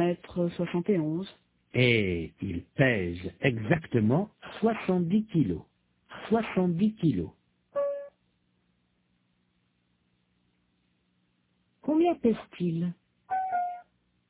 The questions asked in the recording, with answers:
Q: Combien pèse-t-il?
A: 70 kilos.